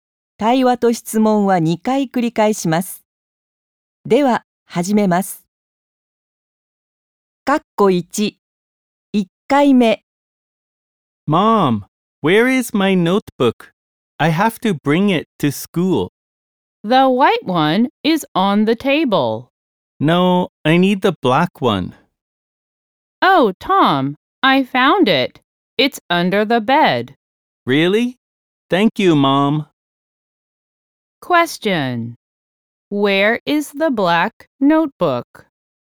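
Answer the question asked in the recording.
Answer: Under the bed.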